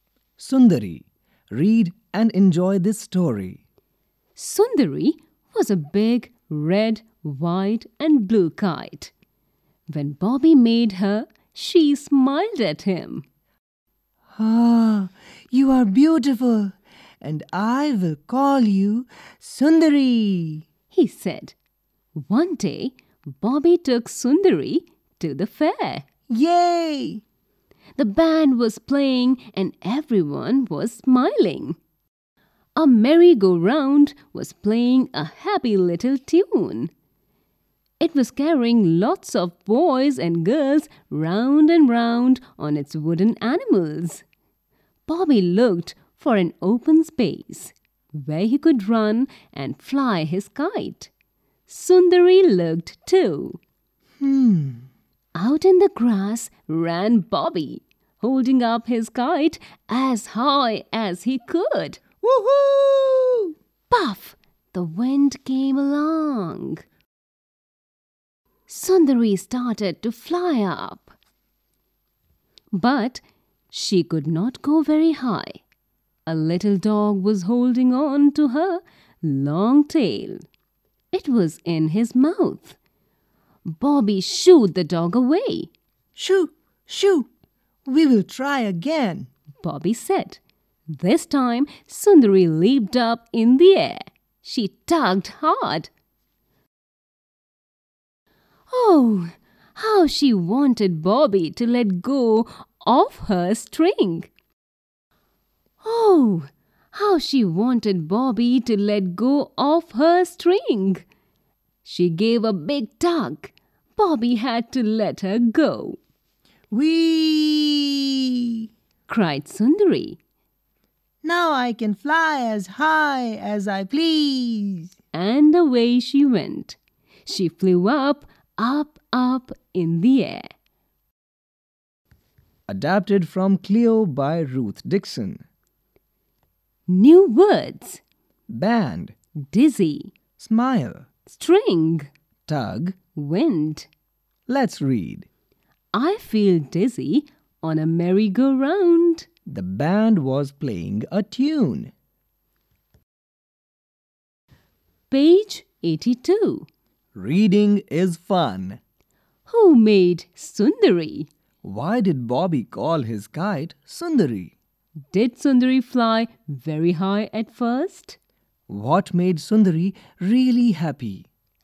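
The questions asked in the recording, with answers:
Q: Who made Sundari?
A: Bobby

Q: Why did Bobby call his kite Sundari?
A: Because she was beautiful

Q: Did Sundari fly very high at first?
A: No, a little dog was holding her tail

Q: What made Sundari really happy?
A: Bobby letting go of her string so she could fly as high as she pleased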